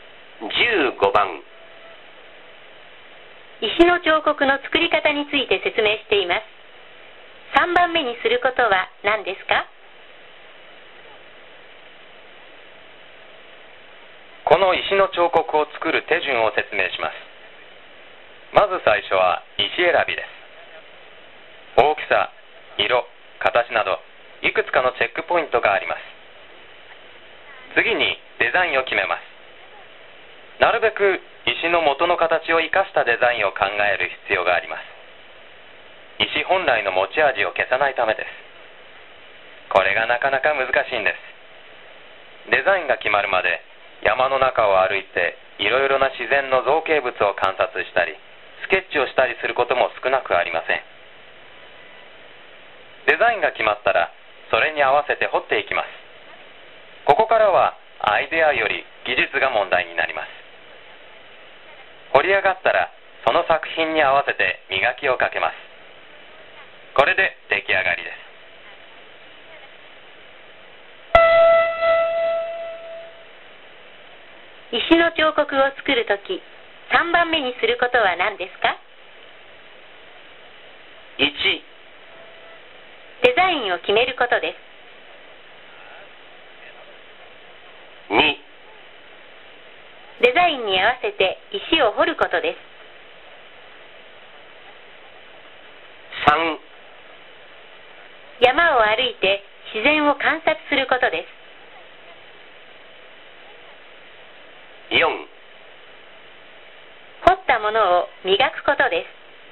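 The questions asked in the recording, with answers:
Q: 石の彫刻を作るとき3番目にすることは何ですか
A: 2: デザインに合わせて石を掘ることです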